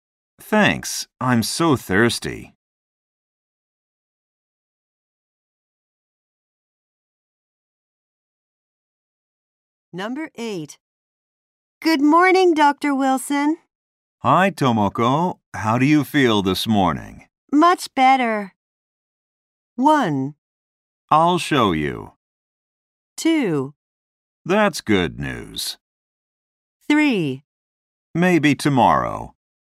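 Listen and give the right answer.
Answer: 2: That's good news.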